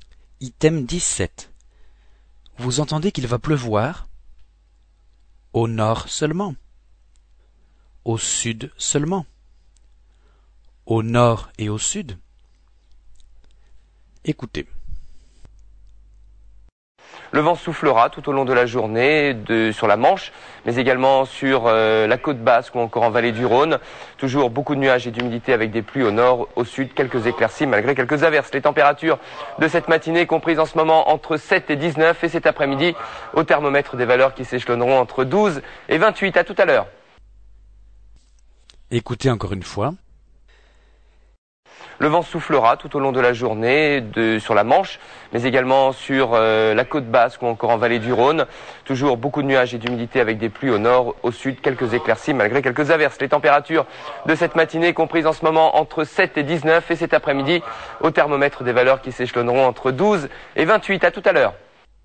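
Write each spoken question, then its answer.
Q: Vous entendez qu'il va pleuvoir? Au nord seulement? Au sud seulement? Au nord et au sud?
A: Au nord et au sud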